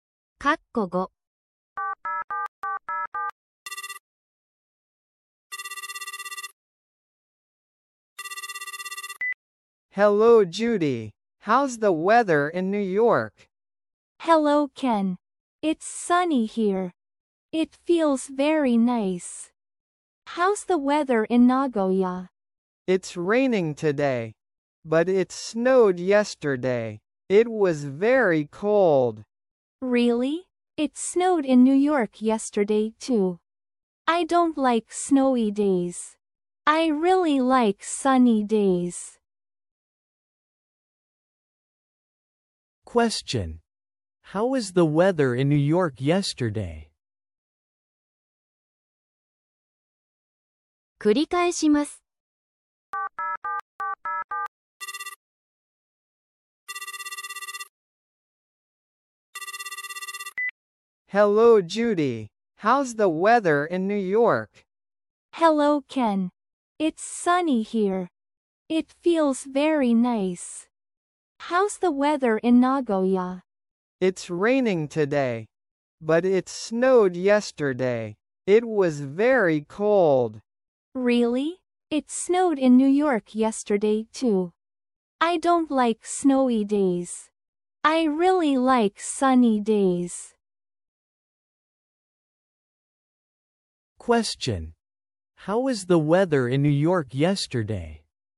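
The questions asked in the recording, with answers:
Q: How was the weather in New York yesterday?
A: It snowed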